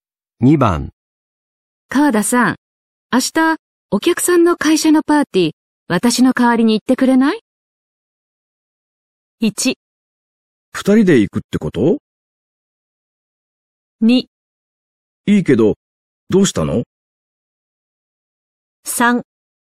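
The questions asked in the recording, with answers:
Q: 川田さん、明日お客さんの会社のパーティー、私の代わりに行ってくれない?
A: 2: いいけどどうしたの?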